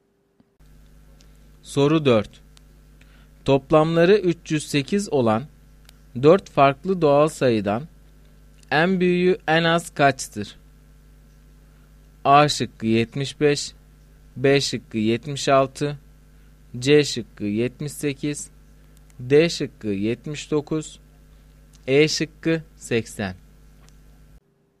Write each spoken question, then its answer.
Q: Toplamları 308 olan 4 farklı doğal sayıdan en büyüğü en az kaçtır?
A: Doğru cevap D şıkkı.